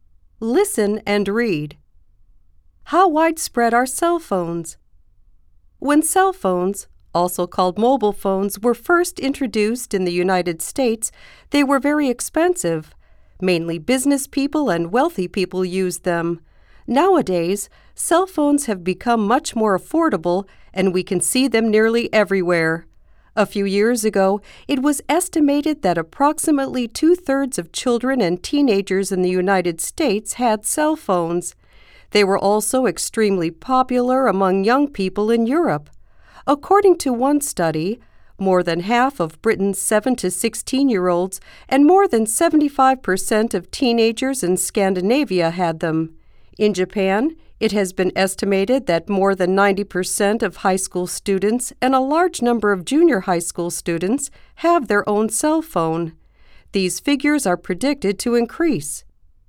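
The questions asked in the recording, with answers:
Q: How widespread are cell phones?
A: Very widespread: they can be seen nearly everywhere (e.g. about 2/3 of US children and teens, over 90% of Japanese high school students)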